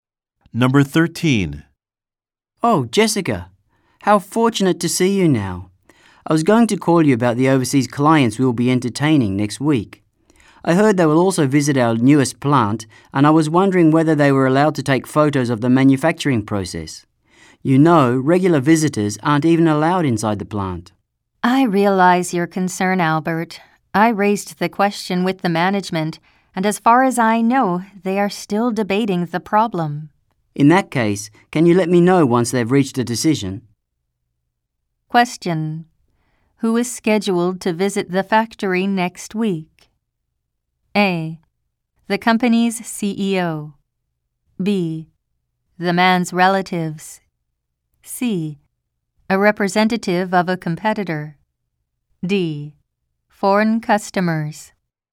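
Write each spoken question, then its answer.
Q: Who is scheduled to visit the factory next week?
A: D: Foreign customers.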